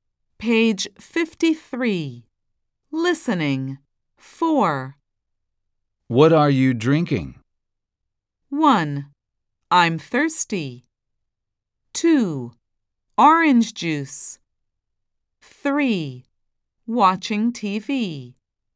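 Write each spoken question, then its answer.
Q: What are you drinking?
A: 2: Orange juice.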